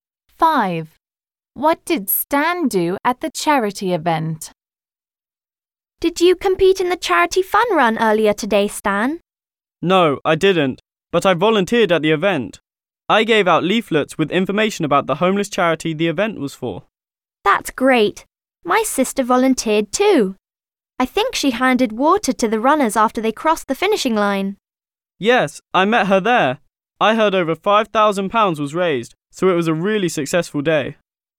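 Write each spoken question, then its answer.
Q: What did Stan do at the charity event?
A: He gave out leaflets about the charity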